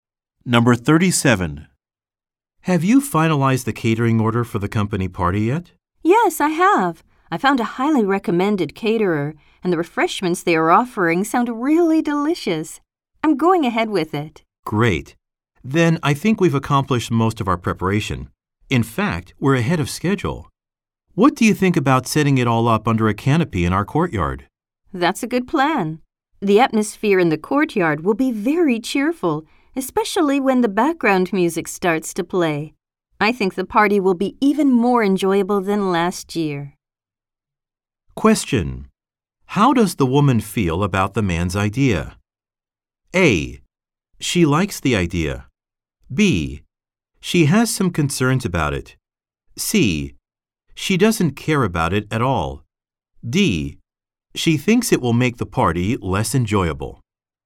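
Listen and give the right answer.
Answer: A: She likes the idea.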